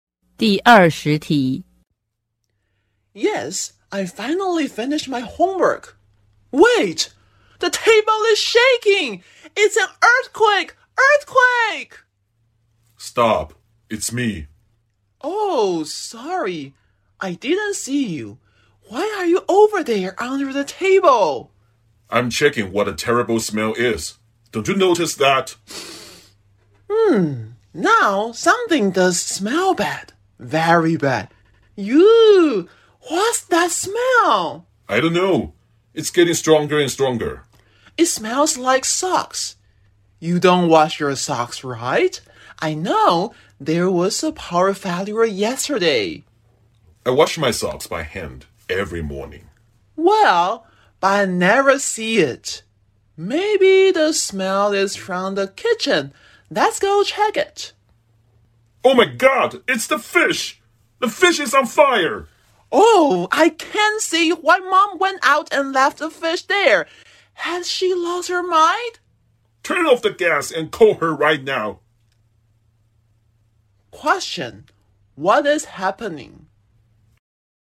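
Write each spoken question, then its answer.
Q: what is happening?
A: The fish in the kitchen is on fire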